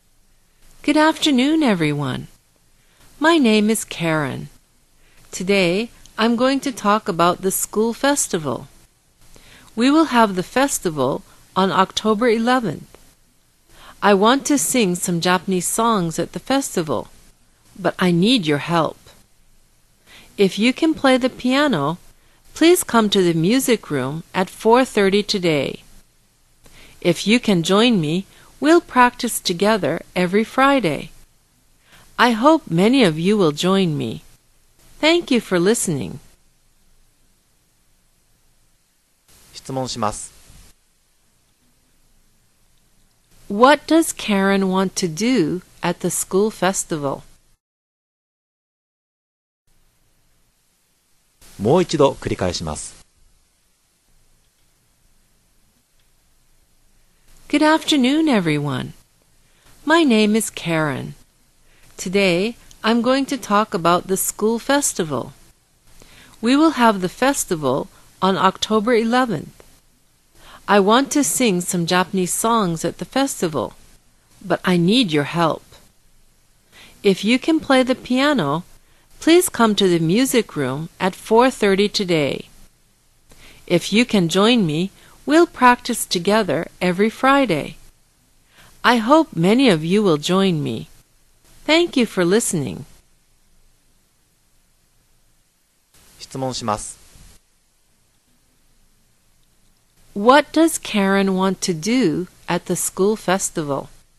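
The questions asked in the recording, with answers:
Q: What does Karen want to do at the school festival?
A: Sing some Japanese songs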